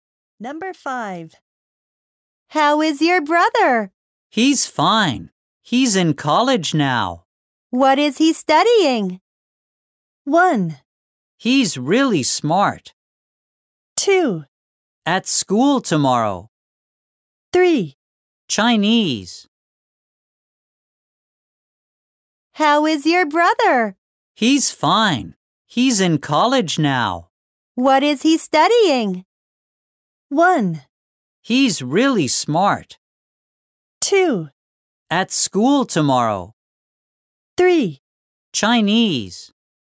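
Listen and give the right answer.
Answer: 3: Chinese.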